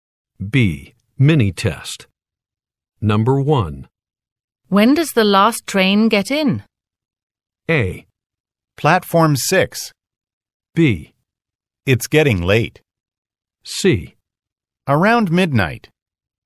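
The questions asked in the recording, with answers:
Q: When does the last train get in?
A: C: Around midnight.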